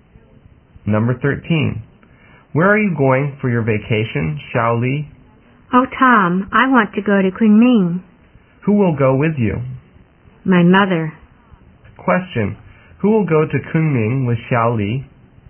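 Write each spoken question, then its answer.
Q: Who will go to Kunming with Shaoli?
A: Her mother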